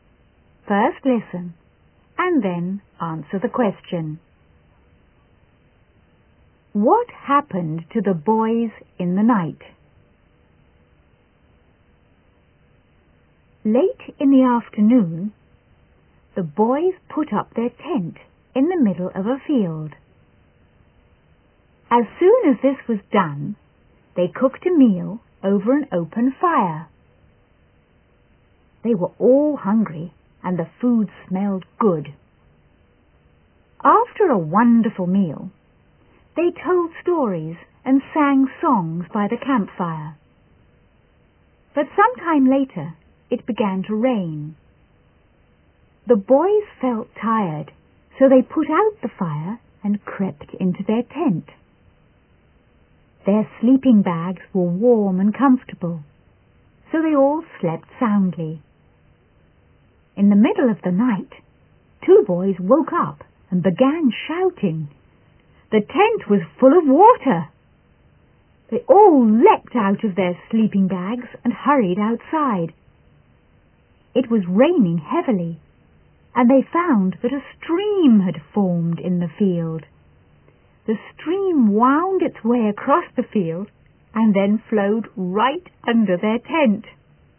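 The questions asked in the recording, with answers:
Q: What happened to the boys in the night?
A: A stream formed in the field and flowed under their tent, filling it with water.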